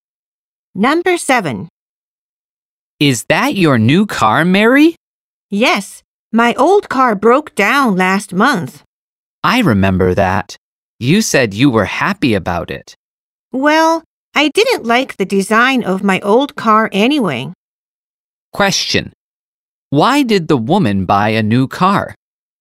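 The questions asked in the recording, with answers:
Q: Why did the woman buy a new car?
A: Because her old car broke down.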